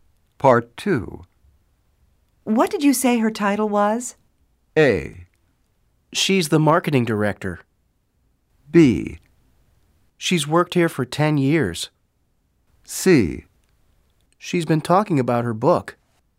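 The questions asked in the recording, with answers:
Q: What did you say her title was?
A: A: She's the marketing director.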